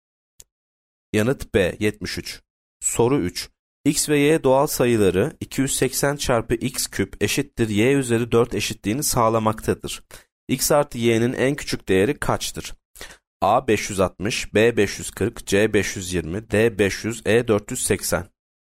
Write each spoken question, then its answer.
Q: X artı Y'nin en küçük değeri kaçtır?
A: Yanıt A 560.